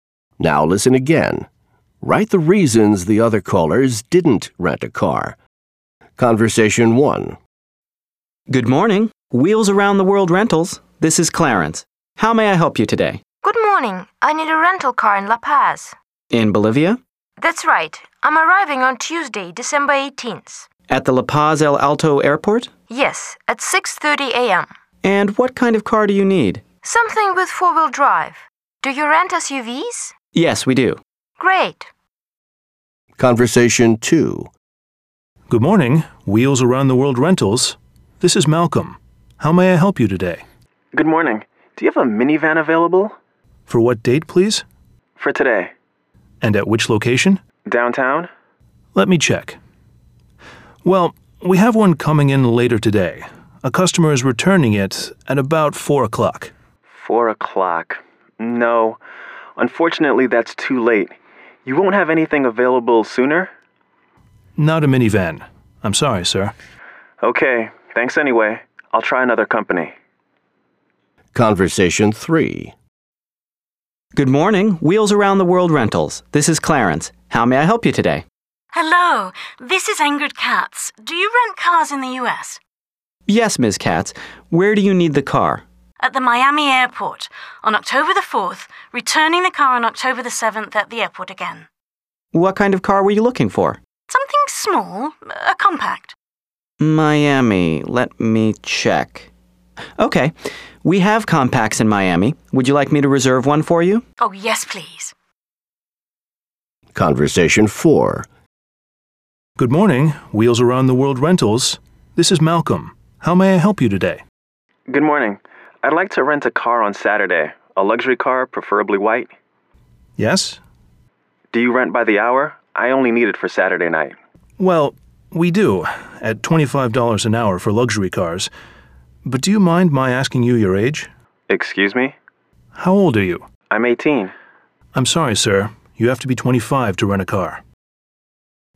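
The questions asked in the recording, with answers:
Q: Write the reasons the other callers didn't rent a car.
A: Conversation 2: no minivan available until about 4 o'clock, which was too late; Conversation 4: the caller is 18, and you have to be 25 to rent a car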